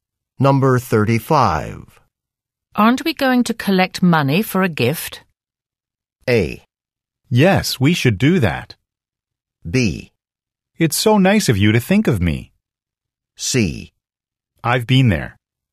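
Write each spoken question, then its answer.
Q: Aren't we going to collect money for a gift?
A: A: Yes, we should do that.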